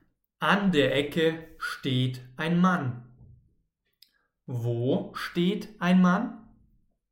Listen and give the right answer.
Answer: An der Ecke, genau. An der Ecke steht ein Mann.